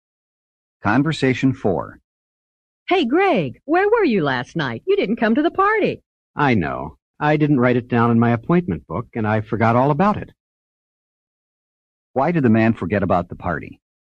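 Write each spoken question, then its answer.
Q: Why did the man forget about the party?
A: He didn't write it down in his appointment book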